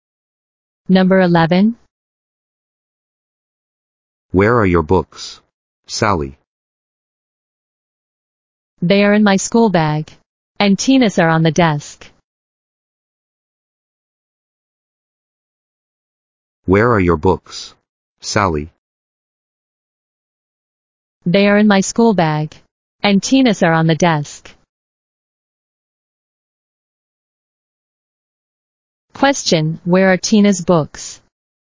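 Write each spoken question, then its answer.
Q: Question, where are Tina's books?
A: On the desk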